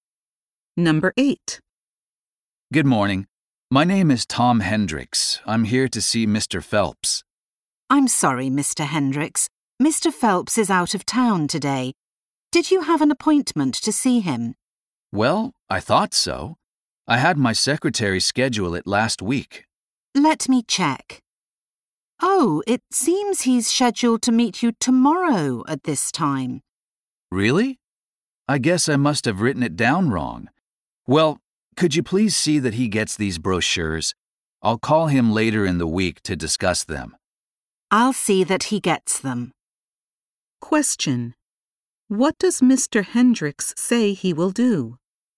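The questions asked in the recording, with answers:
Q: What does Mr. Hendricks say he will do?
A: Call Mr. Phelps later in the week.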